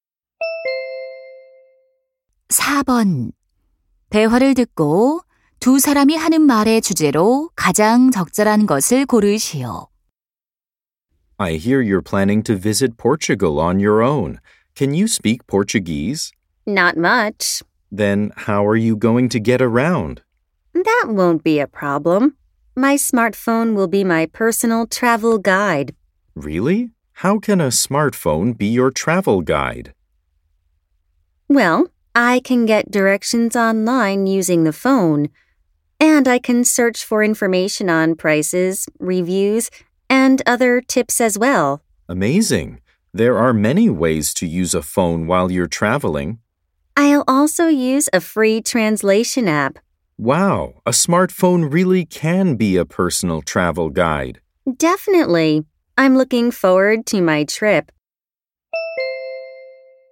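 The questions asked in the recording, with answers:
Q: 대화를 듣고 두 사람이 하는 말의 주제로 가장 적절한 것을 고르시오.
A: 여행 가이드로서 스마트폰의 활용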